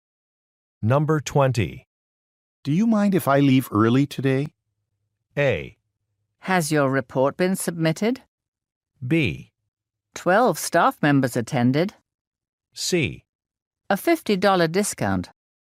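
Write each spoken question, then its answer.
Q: Do you mind if I leave early today?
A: A: Has your report been submitted?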